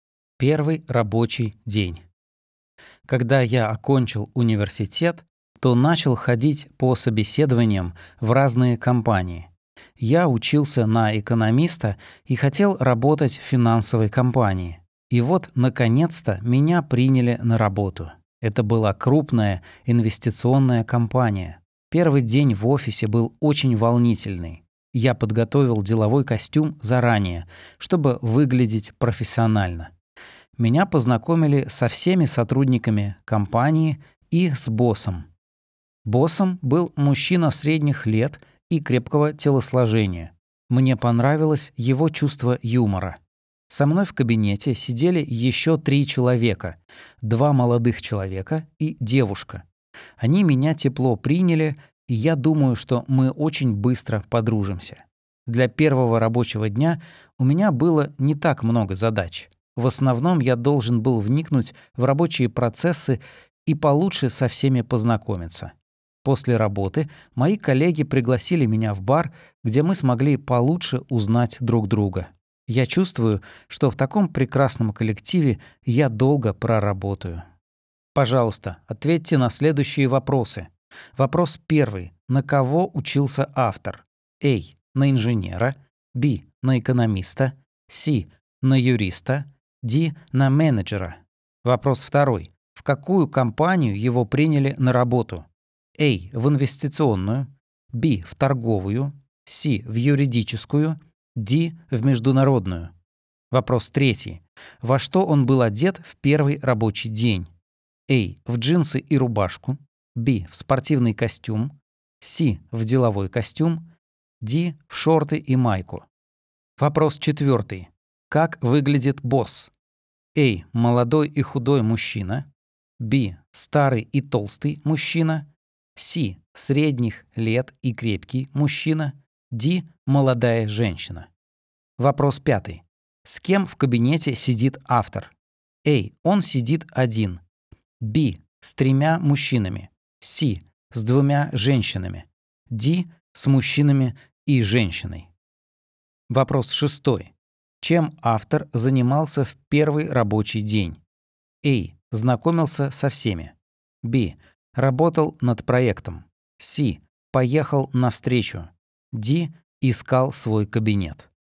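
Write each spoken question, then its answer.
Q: На кого учился автор?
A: Б: На экономиста

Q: В какую компанию его приняли на работу?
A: А: В инвестиционную

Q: Во что он был одет в первый рабочий день?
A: С: В деловой костюм

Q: Как выглядит босс?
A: С: Средних лет и крепкий мужчина

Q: С кем в кабинете сидит автор?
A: Д: С мужчинами и женщиной

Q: Чем автор занимался в первый рабочий день?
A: А: Знакомился со всеми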